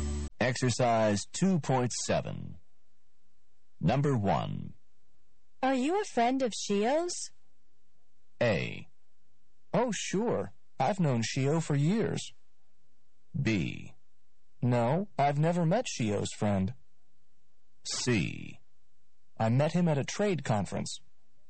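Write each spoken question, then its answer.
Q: Are you a friend of Shio's?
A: A: Oh, sure. I've known Shio for years.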